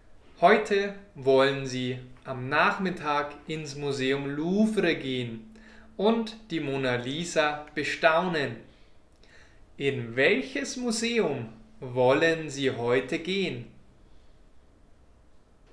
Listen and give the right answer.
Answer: In das Museum Louvre.